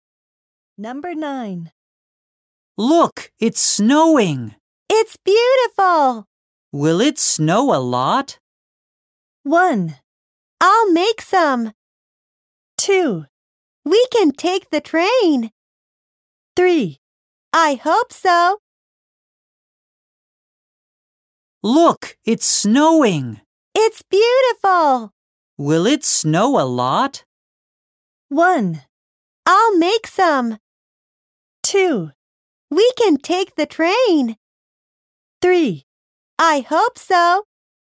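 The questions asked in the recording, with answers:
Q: Will it snow a lot?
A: 3: I hope so.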